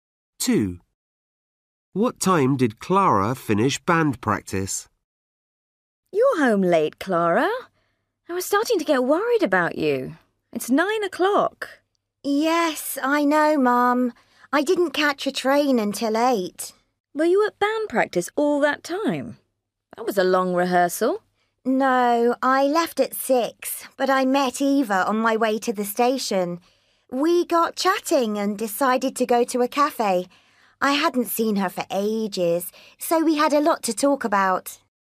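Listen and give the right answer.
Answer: 6 o'clock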